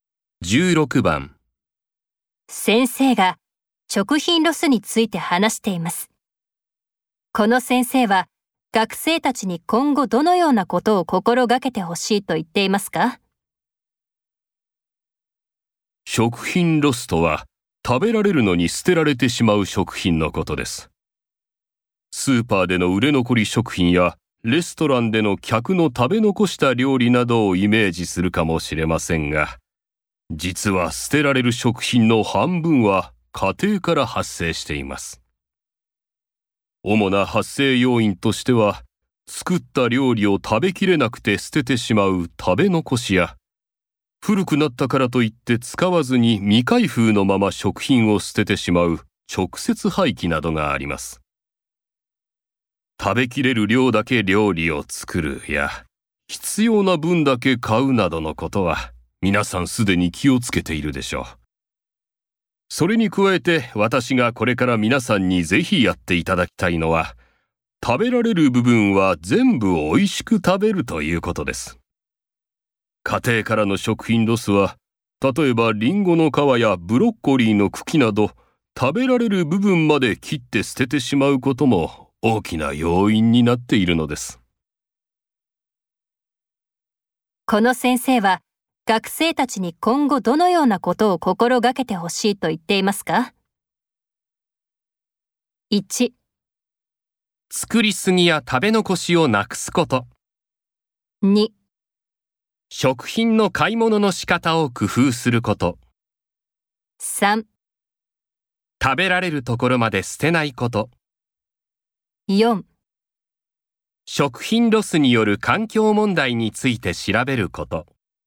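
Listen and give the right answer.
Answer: 3: 食べられるところまで捨てないこと。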